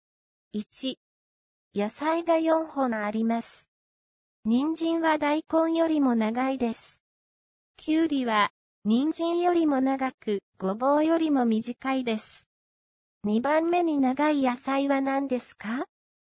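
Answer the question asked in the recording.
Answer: きゅうり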